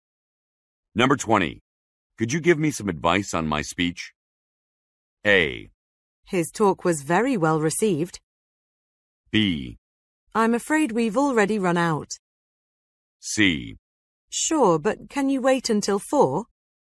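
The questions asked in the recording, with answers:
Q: Could you give me some advice on my speech?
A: C: Sure, but can you wait until 4?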